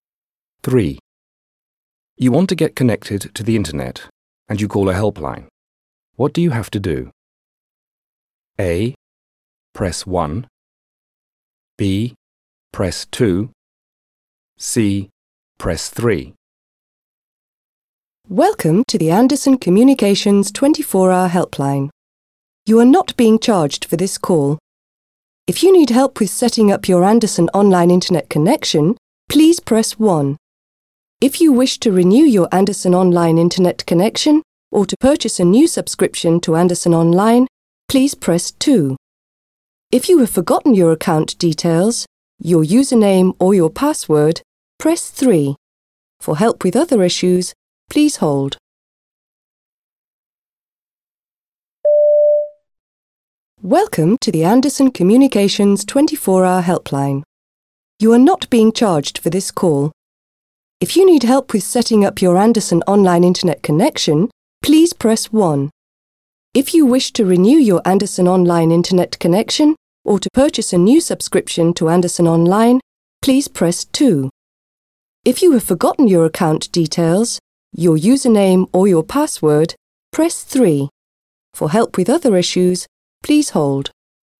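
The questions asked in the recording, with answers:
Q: What do you have to do?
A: A: Press 1.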